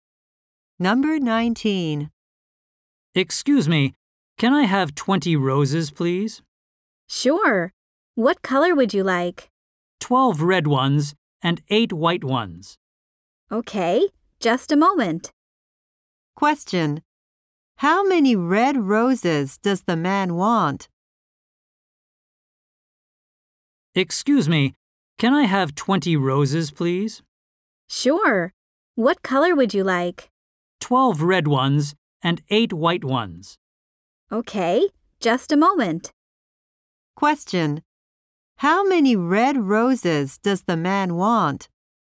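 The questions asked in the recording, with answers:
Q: How many red roses does the man want?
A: 12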